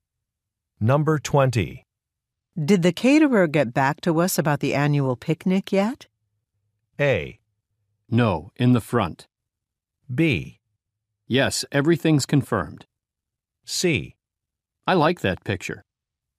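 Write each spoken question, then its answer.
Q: Did the caterer get back to us about the annual picnic yet?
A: B: Yes, everything's confirmed.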